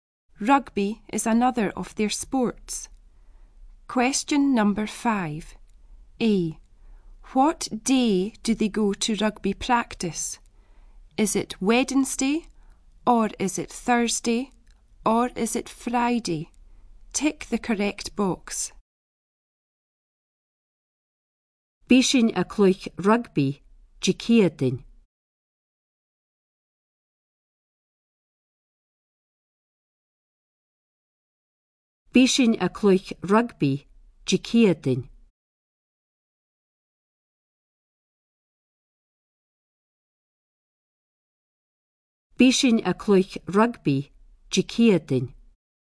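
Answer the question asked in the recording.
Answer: B: Thursday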